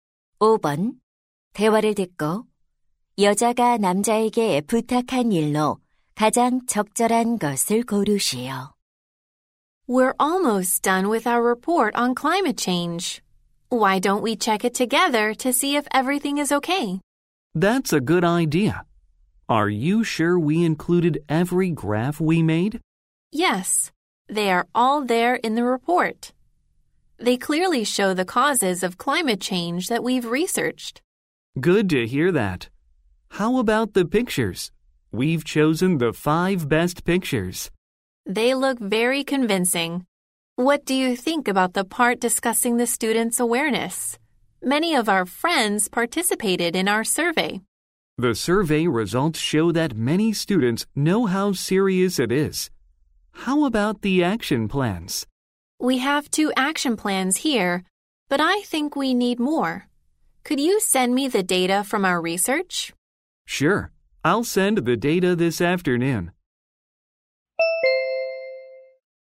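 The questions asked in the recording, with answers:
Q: 대화를 듣고 여자가 남자에게 부탁한 일로 가장 적절한 것을 고르시오.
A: 조사 자료 보내주기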